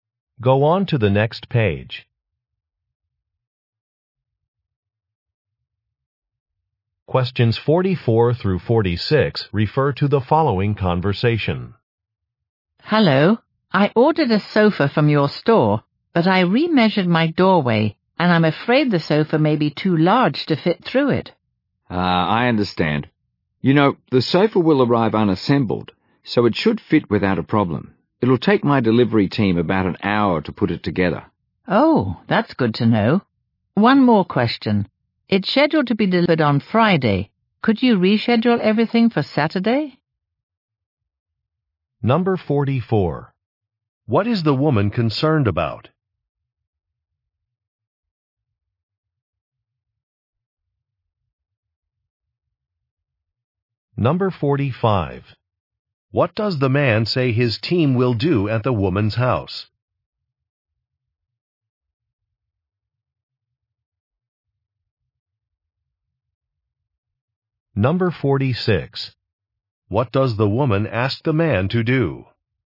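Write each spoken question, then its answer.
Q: What is the woman concerned about?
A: The sofa may be too large to fit through her doorway

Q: What does the man say his team will do at the woman's house?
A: Assemble the sofa

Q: What does the woman ask the man to do?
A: Reschedule the delivery for Saturday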